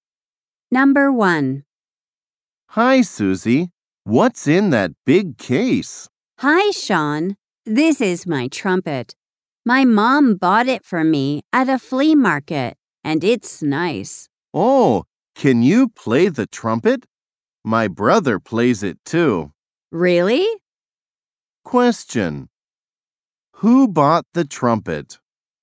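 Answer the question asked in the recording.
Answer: Susie's mom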